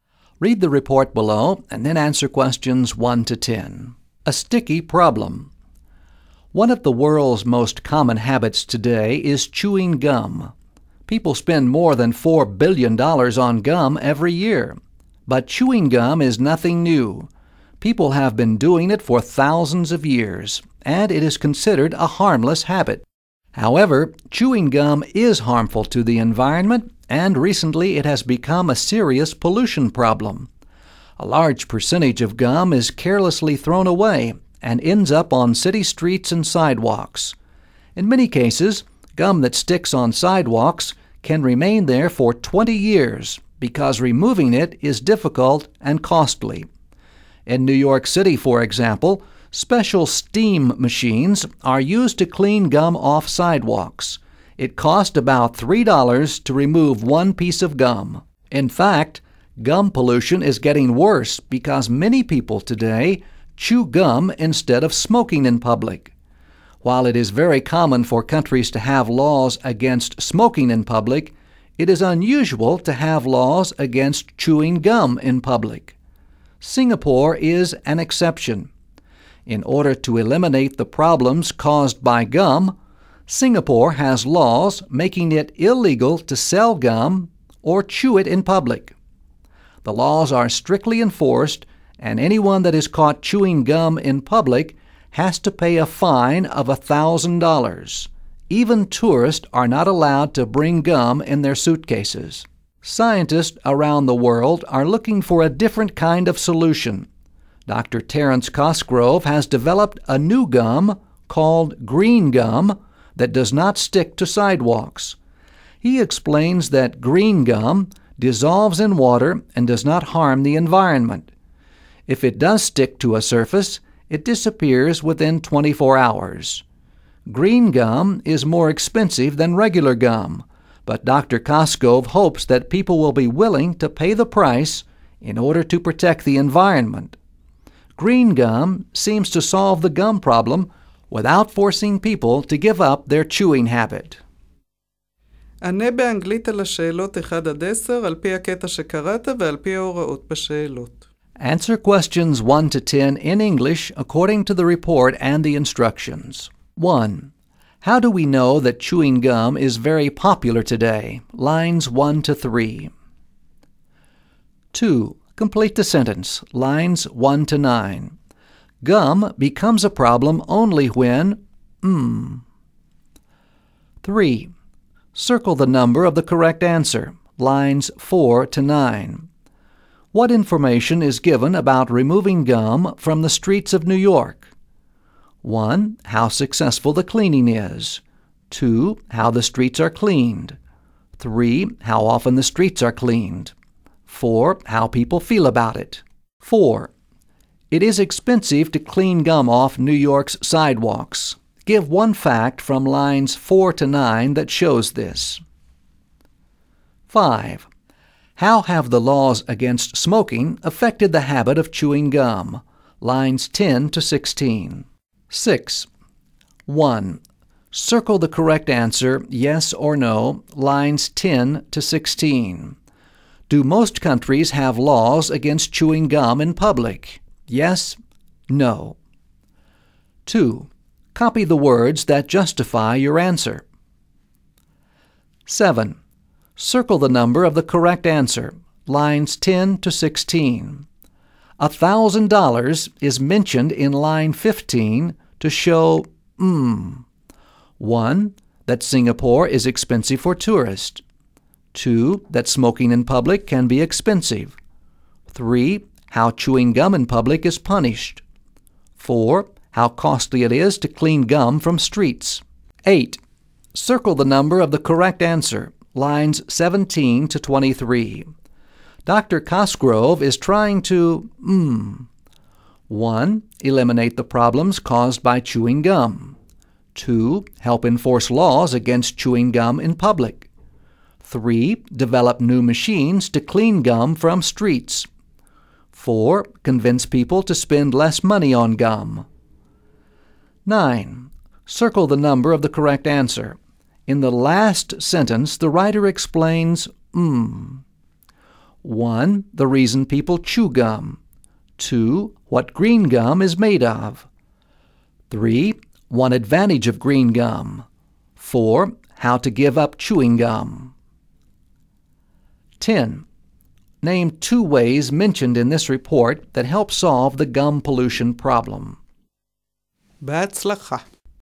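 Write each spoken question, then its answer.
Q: How do we know that chewing gum is very popular today?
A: People spend more than $4 billion on gum every year.

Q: Gum becomes a problem only when...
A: it is carelessly thrown away and ends up on streets and sidewalks.

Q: What information is given about removing gum from the streets of New York?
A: 2: How the streets are cleaned.

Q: Give one fact from lines 4 to 9 that shows this.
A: It costs about $3 to remove one piece of gum.

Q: How have the laws against smoking affected the habit of chewing gum?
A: Many people now chew gum instead of smoking in public.

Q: Do most countries have laws against chewing gum in public?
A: No: it is unusual to have laws against chewing gum in public.

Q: $1,000 is mentioned in line 15 to show 1.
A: 3: How chewing gum in public is punished.

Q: Dr. Cosgrove is trying to 1.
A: 1: Eliminate the problems caused by chewing gum.

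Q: In the last sentence, the writer explains 1.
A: 3: One advantage of green gum.

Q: Name two ways mentioned in this report that help solve the gum pollution problem.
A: Laws against selling or chewing gum in public (Singapore), and green gum that does not stick.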